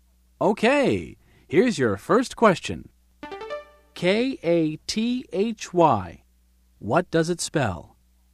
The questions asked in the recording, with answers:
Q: K-A-T-H-Y. What does it spell?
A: That's my name, Kathy.